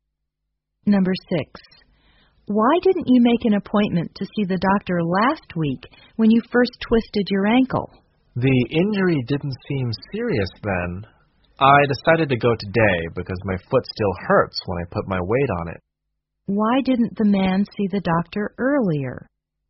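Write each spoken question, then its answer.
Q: Why didn't the man see the doctor earlier?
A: The injury didn't seem serious then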